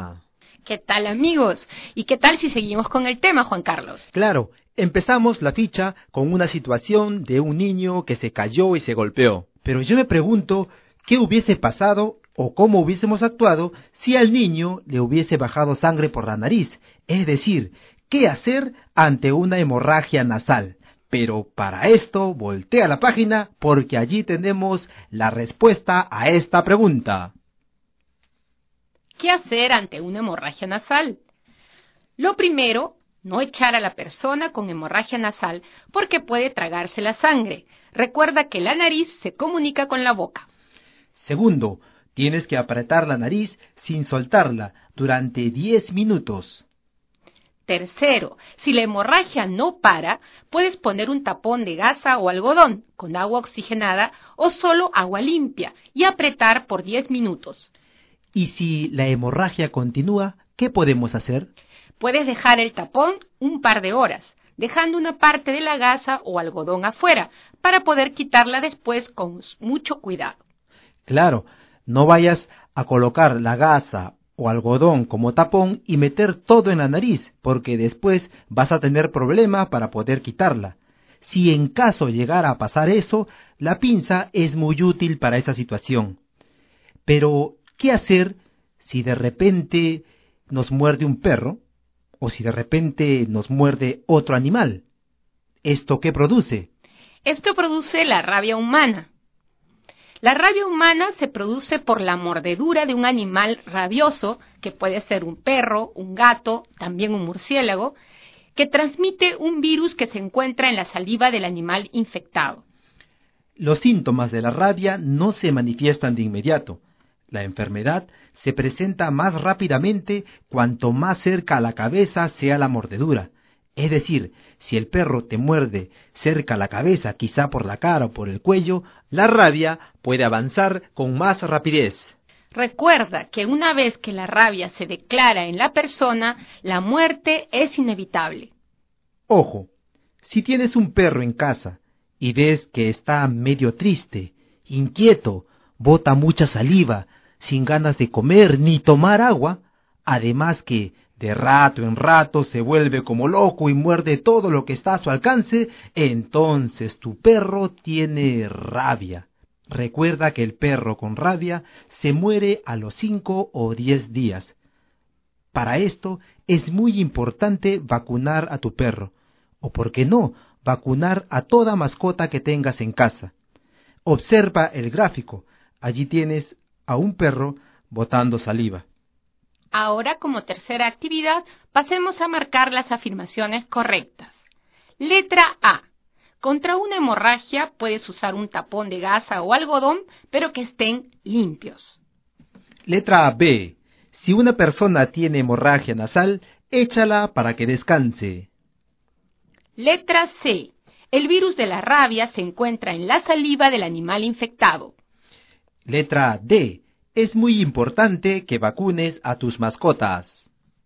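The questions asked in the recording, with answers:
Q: Contra una hemorragia puedes usar un tapón de gasa o algodón, pero que estén limpios.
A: Correcta

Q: Si una persona tiene hemorragia nasal, échala para que descanse.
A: Incorrecta

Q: El virus de la rabia se encuentra en la saliva del animal infectado.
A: Correcta

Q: Es muy importante que vacunes a tus mascotas.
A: Correcta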